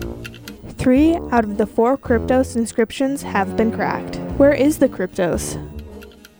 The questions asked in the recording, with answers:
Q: Where is the Cryptos?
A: The Cryptos is located in Langley, Virginia, outside of the CIA headquarters.